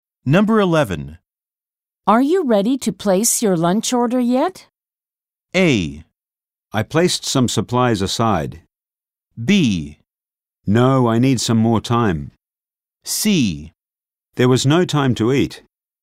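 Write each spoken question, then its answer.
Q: Are you ready to place your lunch order yet?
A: B: No, I need some more time.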